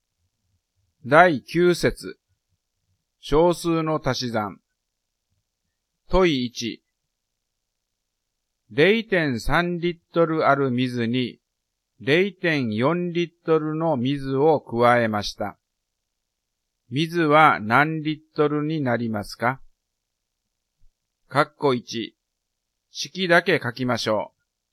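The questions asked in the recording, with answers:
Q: 水は何リットルになりますか?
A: 0.7リットル(0.3+0.4)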